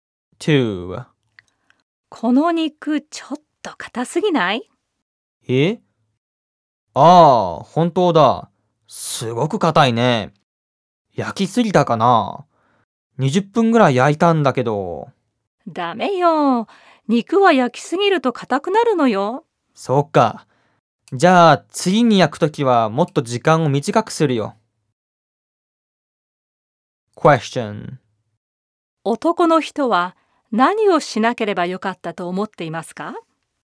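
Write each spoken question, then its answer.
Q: 男の人は何をしなければよかったと思っていますか?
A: 肉を焼きすぎなければよかった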